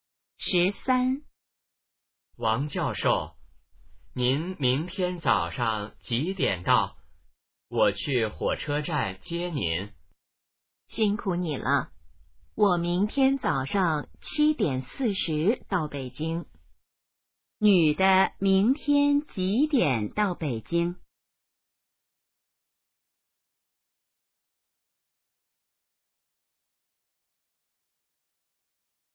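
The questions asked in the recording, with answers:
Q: 女的明天几点到北京?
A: 早上7:40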